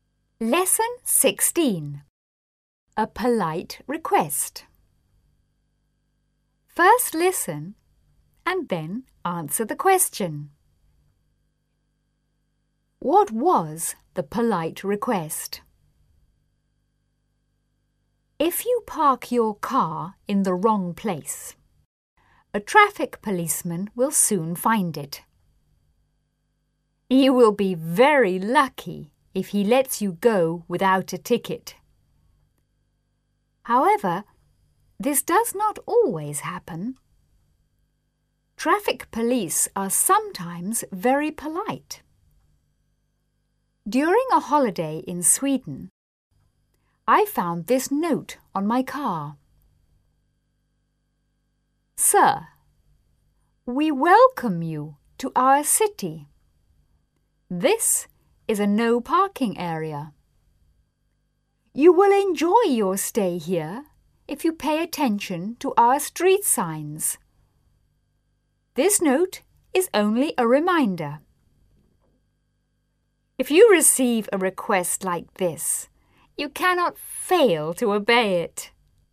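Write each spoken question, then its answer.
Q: What was the polite request?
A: To pay attention to the street signs and not park in a no parking area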